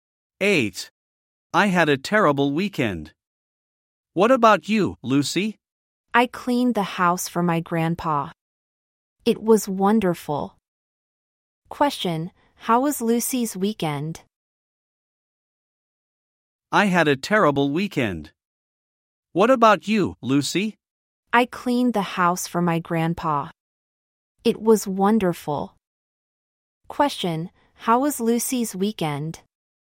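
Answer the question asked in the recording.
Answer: Wonderful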